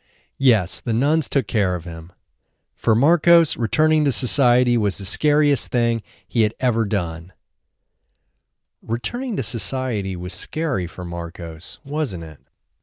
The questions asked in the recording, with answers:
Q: Returning to society was scary for Marcos, wasn't it?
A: Yes, returning to society was the scariest thing he'd ever done.